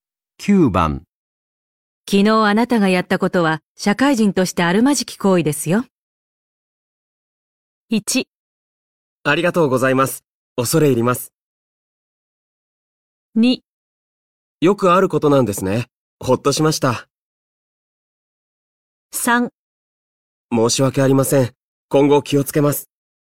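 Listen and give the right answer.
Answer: 3: 申し訳ありません。今後気をつけます。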